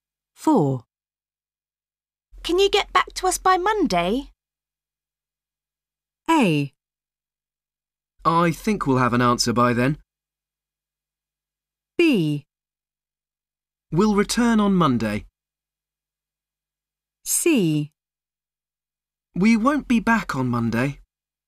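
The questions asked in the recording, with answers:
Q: Can you get back to us by Monday?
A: A: I think we'll have an answer by then.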